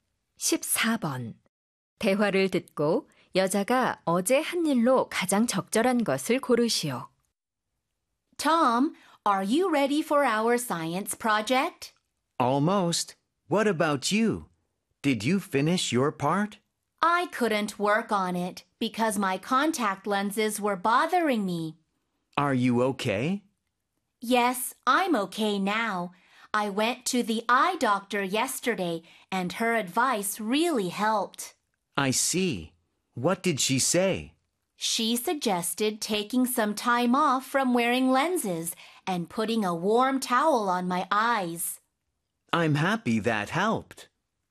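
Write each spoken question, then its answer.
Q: 대화를 듣고 여자가 어제 한 일로 가장 적절한 것을 고르시오.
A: 안과에 갔다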